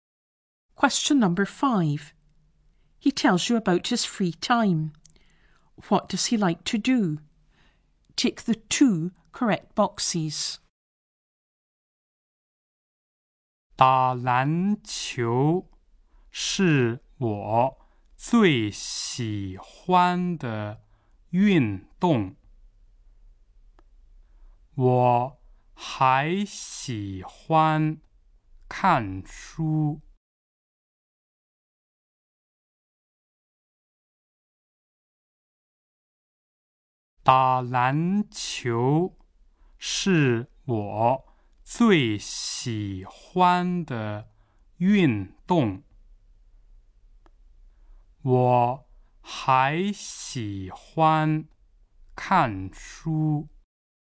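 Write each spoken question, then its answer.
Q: What does he like to do?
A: Play basketball and read books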